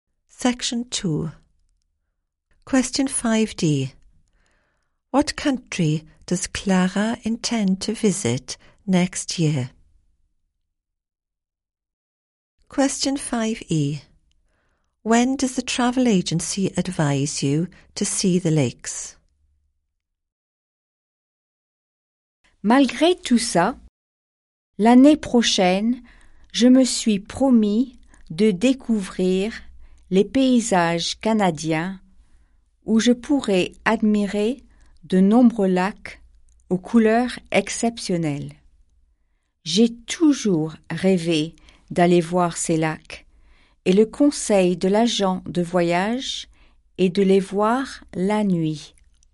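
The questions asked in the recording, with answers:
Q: What country does Clara intend to visit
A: Canada

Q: When does the travel agency advise you to see the lakes?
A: At night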